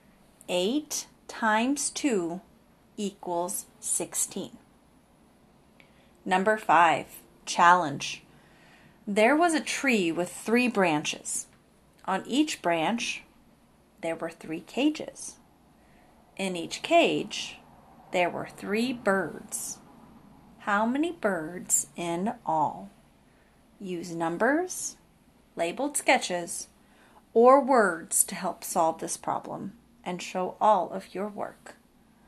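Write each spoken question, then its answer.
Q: How many birds in all?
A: 27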